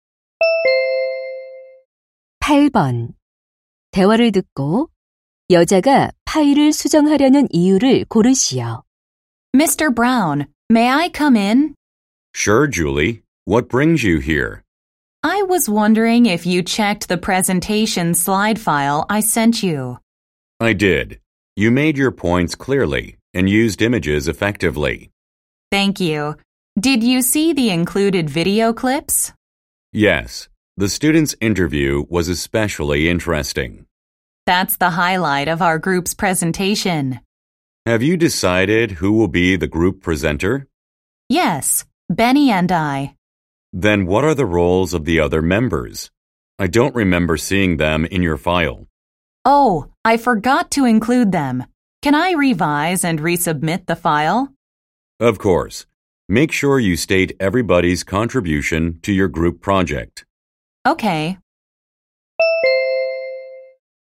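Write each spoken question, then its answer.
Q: 대화를 듣고 여자가 파일을 수정하려는 이유를 고르시오.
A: 다른 조원들의 역할을 넣지 않아서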